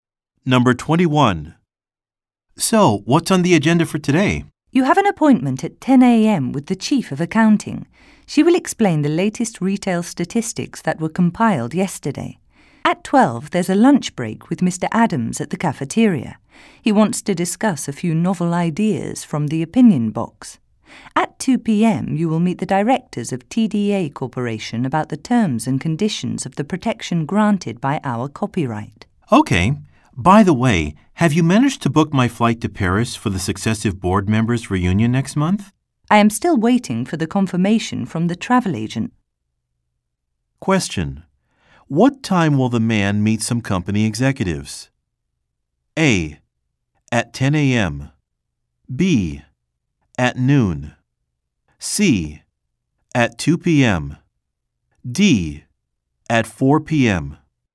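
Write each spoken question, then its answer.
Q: What time will the man meet some company executives?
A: C: At 2 p.m.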